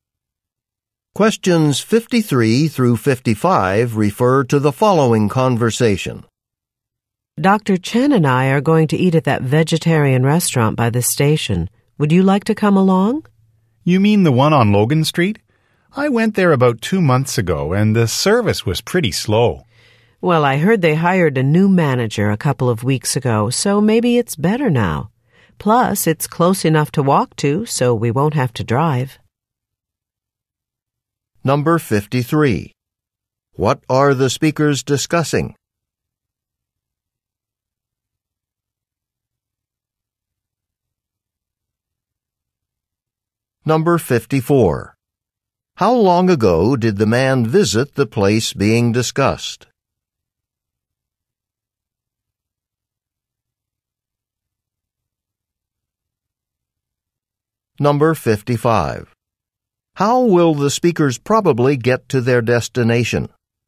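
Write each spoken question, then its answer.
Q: What are the speakers discussing?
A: A vegetarian restaurant where they might eat

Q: How long ago did the man visit the place being discussed?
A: About 2 months ago

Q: How will the speakers probably get to their destination?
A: They will walk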